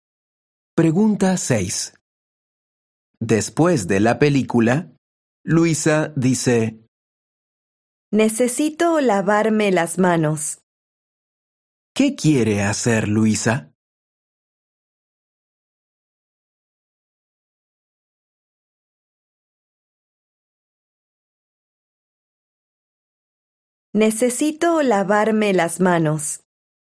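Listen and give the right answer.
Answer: lavarse las manos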